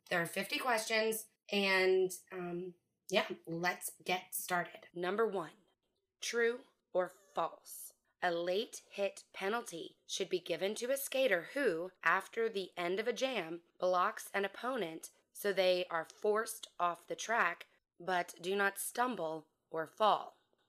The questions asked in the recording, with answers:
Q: A late hit penalty should be given to a skater who, after the end of a jam, blocks an opponent so they are forced off the track but do not stumble or fall.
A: The answer is false.